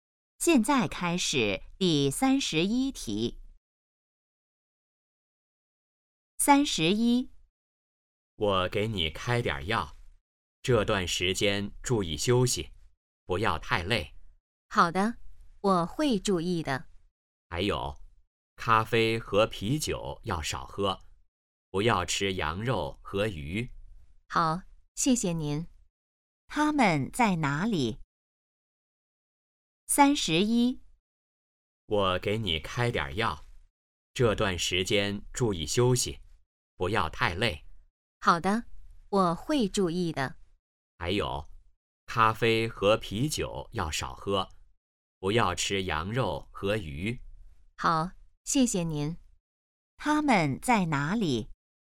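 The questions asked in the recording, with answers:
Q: 他们在哪里?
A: 医院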